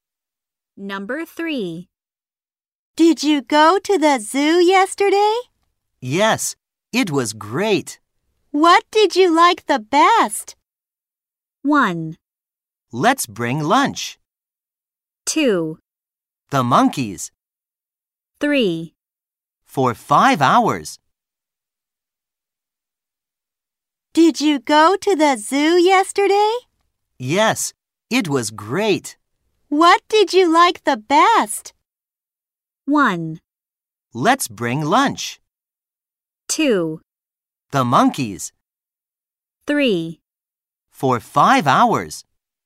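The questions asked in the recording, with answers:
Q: What did you like the best?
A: 2: The monkeys.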